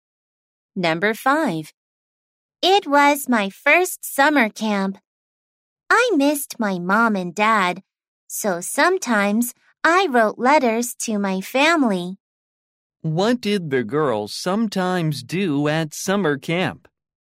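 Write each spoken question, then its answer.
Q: What did the girls sometimes do at summer camp?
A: She wrote letters to her family.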